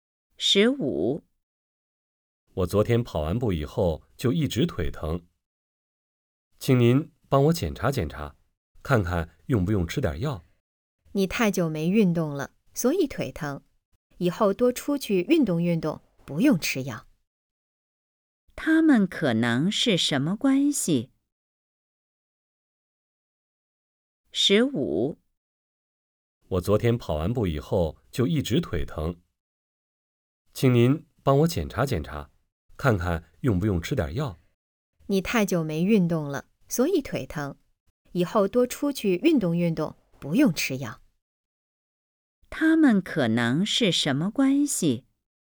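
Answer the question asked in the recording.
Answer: 医生和病人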